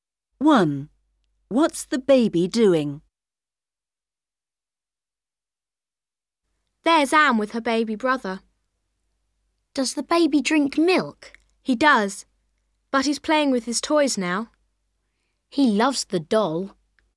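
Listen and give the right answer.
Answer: playing with his toys (the doll)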